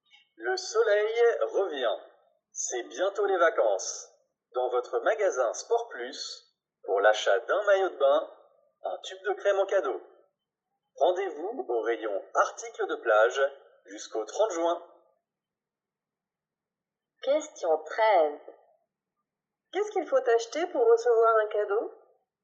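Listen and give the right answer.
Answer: Un maillot de bain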